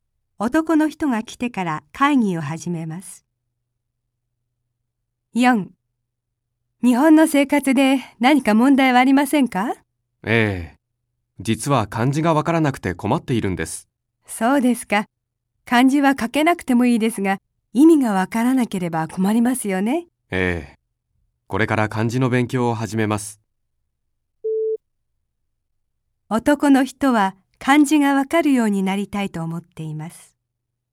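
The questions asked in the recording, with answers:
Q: 男の人は漢字がわかるようになりたいと思っています。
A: ○(正しい)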